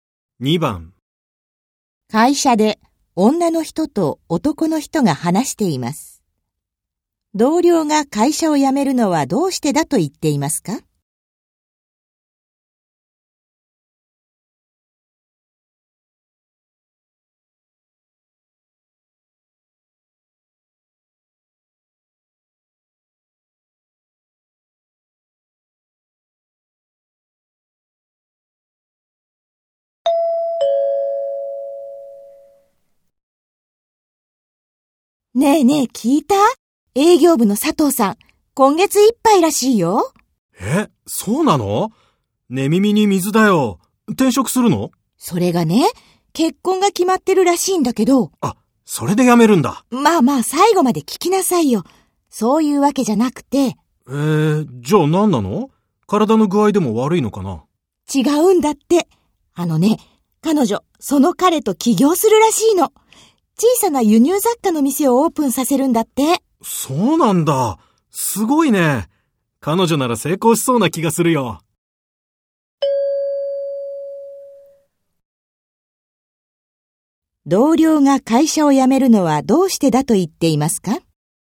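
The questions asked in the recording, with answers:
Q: 同僚が会社を辞めるのはどうしてだと言っていますか?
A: 結婚相手と起業して輸入雑貨の店を開くから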